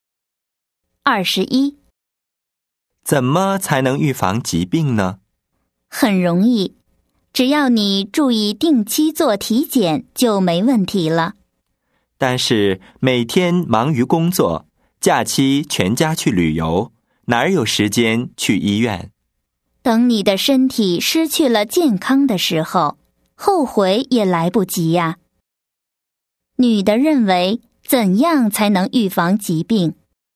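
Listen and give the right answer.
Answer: 定期做体检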